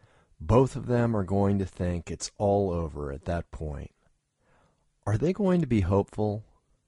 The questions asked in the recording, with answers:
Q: Are they going to be hopeful?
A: No, they're going to think it's all over at that point.